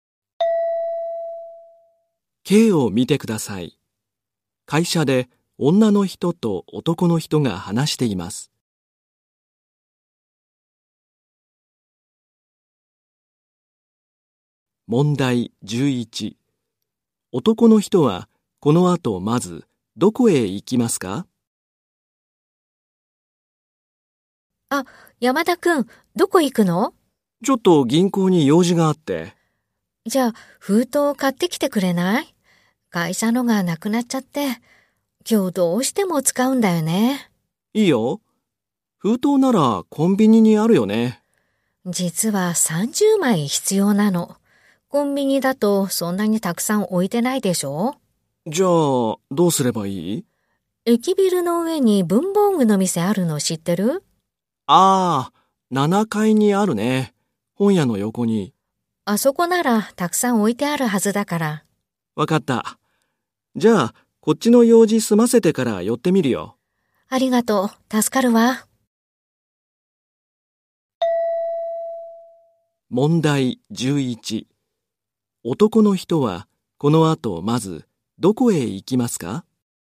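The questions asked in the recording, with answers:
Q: 男の人はこの後まず、どこへ行きますか?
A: 銀行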